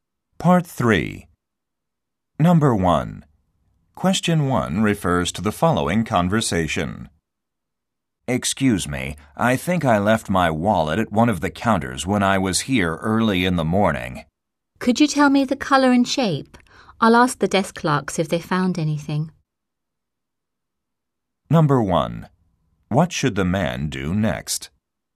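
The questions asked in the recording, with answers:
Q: What should the man do next?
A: Describe the wallet's color and shape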